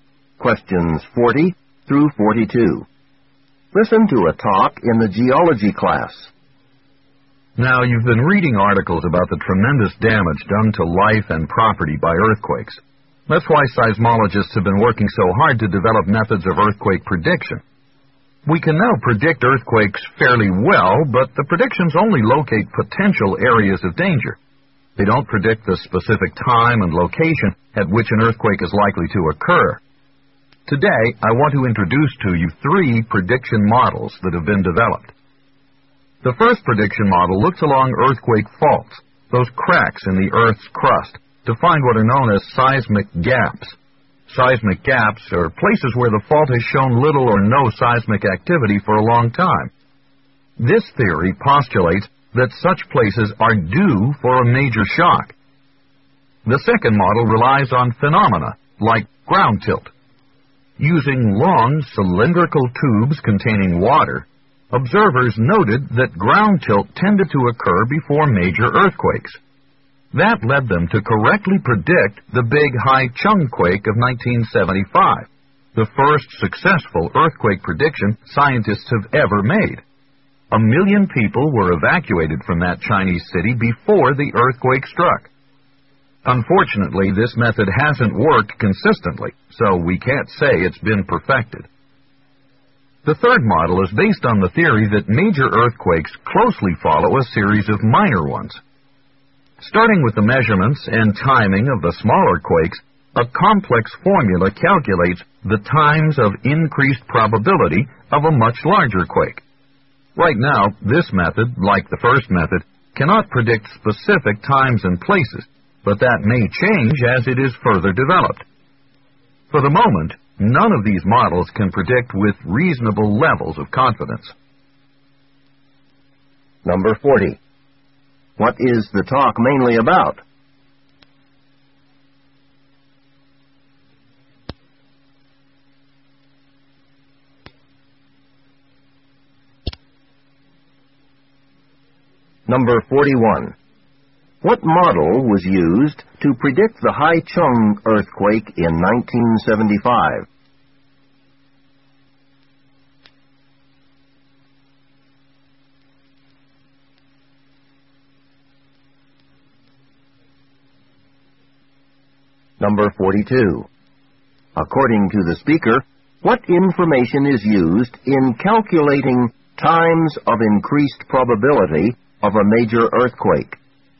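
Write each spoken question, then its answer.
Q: What is the talk mainly about?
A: Models for predicting earthquakes

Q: What model was used to predict the Haichung earthquake in 1975?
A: The ground tilt model

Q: According to the speaker, what information is used in calculating times of increased probability of a major earthquake?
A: The measurements and timing of smaller quakes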